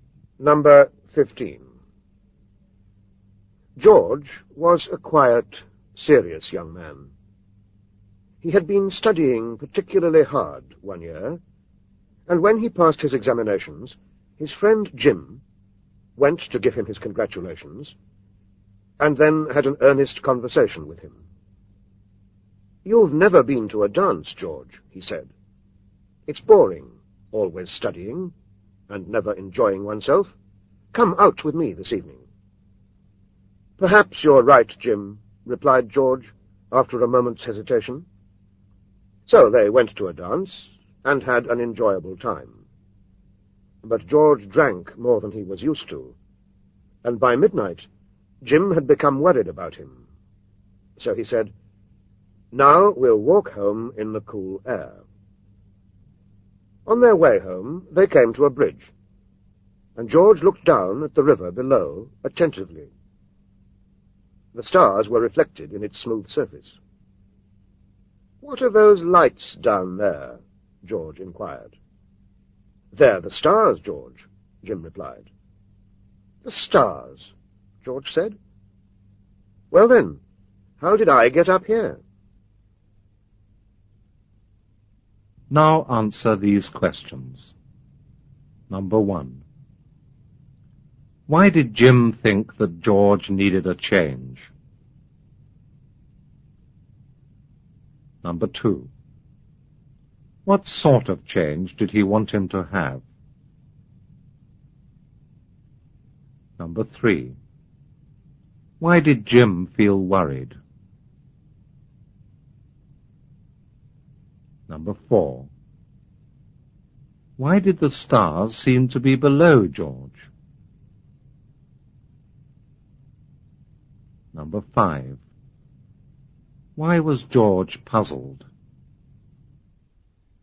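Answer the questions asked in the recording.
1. Because George was always studying and never enjoyed himself
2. To go out to a dance and enjoy himself
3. Because George had drunk more than he was used to
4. They were reflected in the river below the bridge
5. He was drunk and thought the stars were below him, so he wondered how he had got up above them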